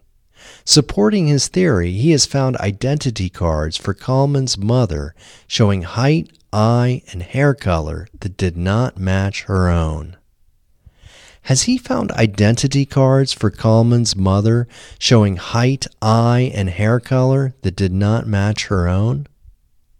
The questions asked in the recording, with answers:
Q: Has he found identity cards for Kalman's mother showing height, eye, and hair color that did not match her own?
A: Yes, he has found identity cards for Kalman's mother showing height, eye, and hair color that did not match her own.